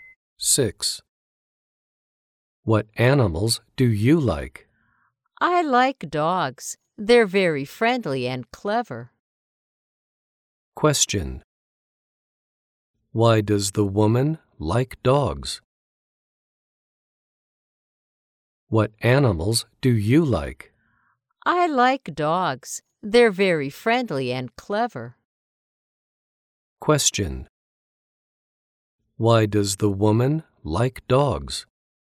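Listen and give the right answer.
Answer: They're very friendly and clever.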